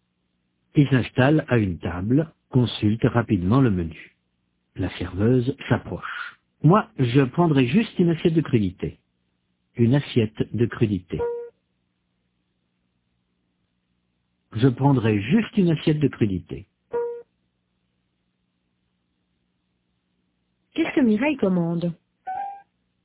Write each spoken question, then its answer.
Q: Qu'est-ce que Mireille commande ?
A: Une assiette de crudité.